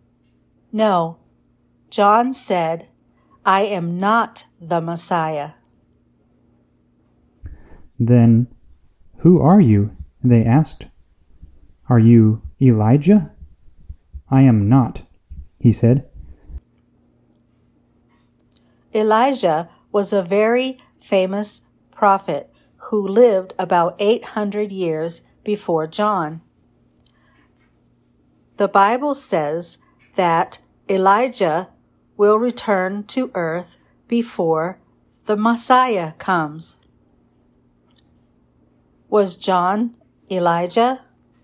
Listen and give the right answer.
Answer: No, John was not Elijah. John was John.